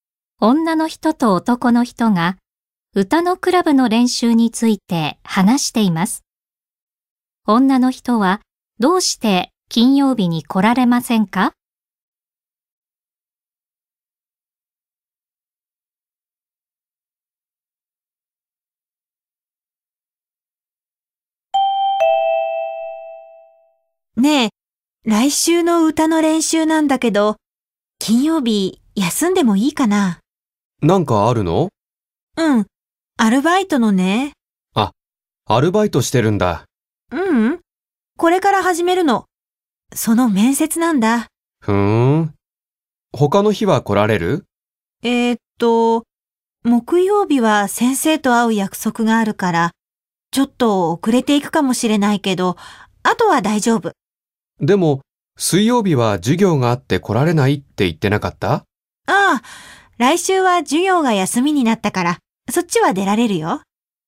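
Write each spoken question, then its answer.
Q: 女の人はどうして金曜日に来られませんか?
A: アルバイトの面接があるから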